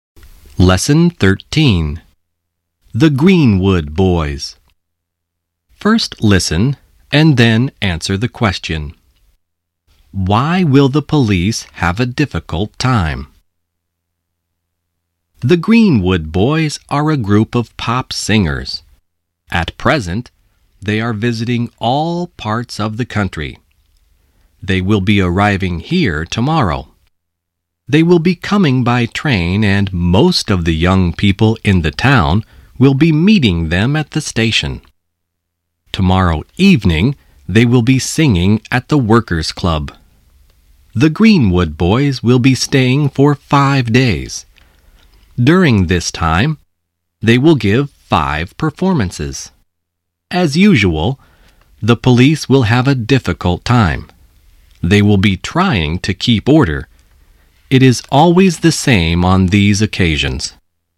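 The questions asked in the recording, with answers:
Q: Why will the police have a difficult time?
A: Because they will be trying to keep order when the Greenwood Boys come.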